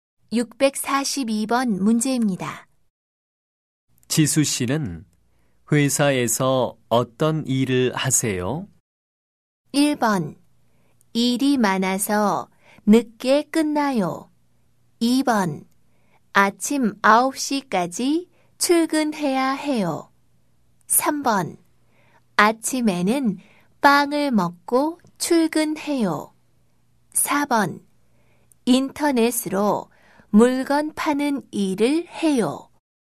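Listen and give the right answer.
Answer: 4: 인터넷으로 물건 파는 일을 해요.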